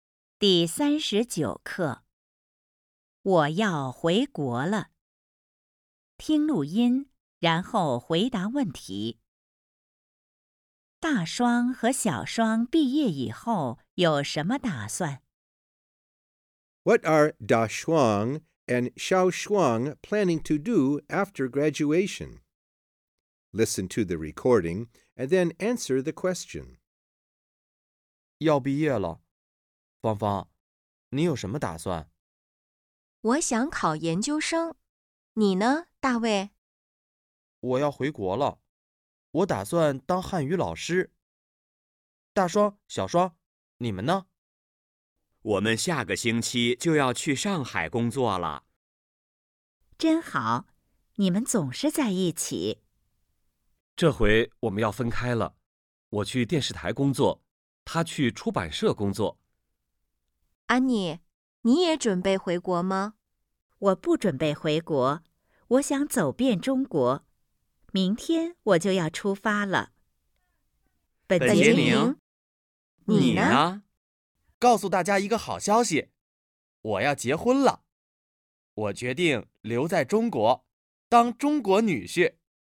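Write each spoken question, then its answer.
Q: 大双和小双毕业以后有什么打算?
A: 去上海工作,一个去电视台,一个去出版社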